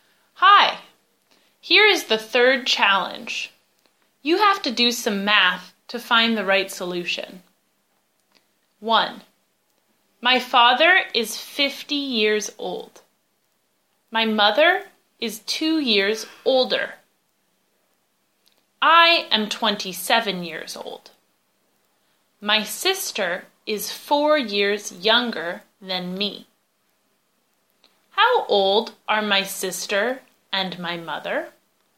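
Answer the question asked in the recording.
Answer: Sister 23, mother 52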